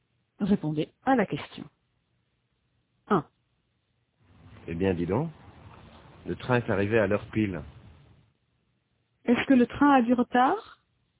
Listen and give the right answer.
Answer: Non, il est arrivé à l'heure pile.